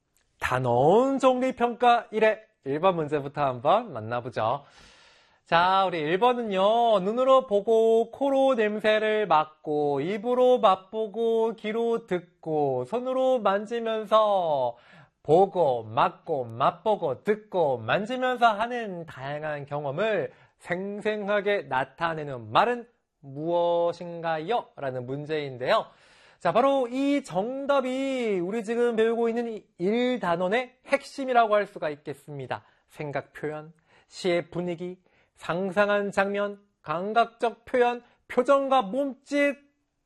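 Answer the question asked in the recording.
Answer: 4: 감각적 표현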